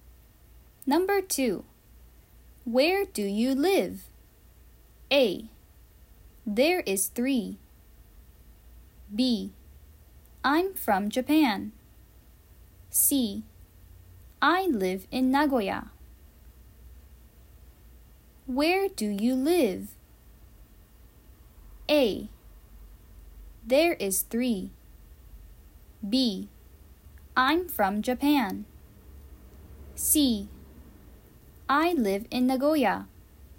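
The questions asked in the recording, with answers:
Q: Where do you live?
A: C: I live in Nagoya.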